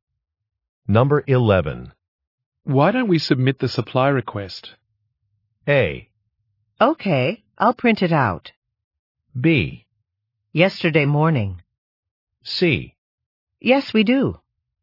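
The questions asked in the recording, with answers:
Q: Why don't we submit the supply request?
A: A: Okay, I'll print it out.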